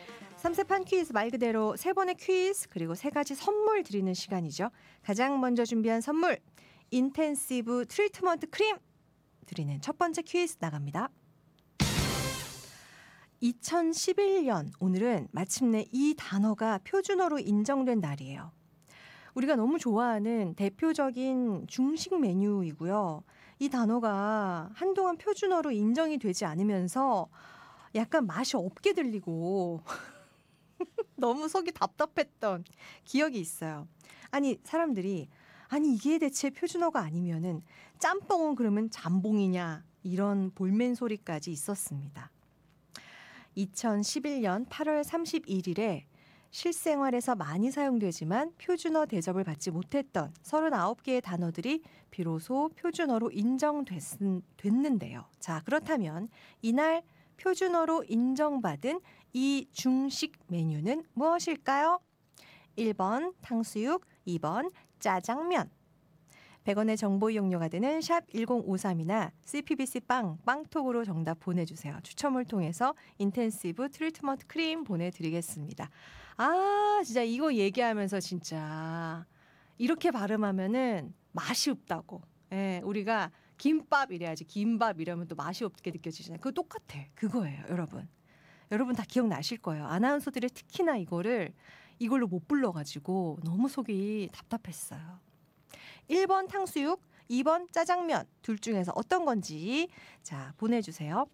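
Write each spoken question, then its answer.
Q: 자, 그렇다면 이날 표준어로 인정받은 이 중식 메뉴는 무엇일까요?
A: 2: 짜장면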